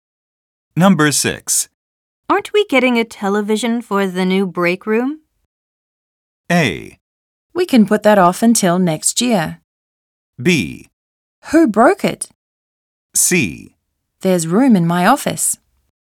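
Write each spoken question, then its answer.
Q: Aren't we getting a television for the new break room?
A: A: We can put that off until next year.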